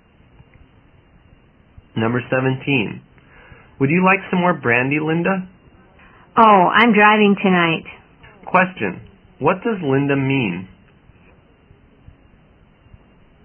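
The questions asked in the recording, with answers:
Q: what does Linda mean?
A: She doesn't want more brandy because she is driving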